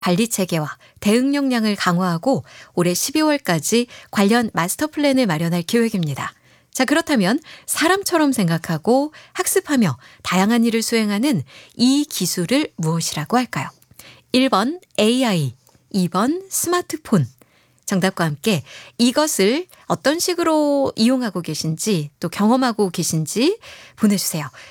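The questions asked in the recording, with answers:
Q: 자, 그렇다면 사람처럼 생각하고 학습하며 다양한 일을 수행하는 이 기술을 무엇이라고 할까요?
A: 1번: AI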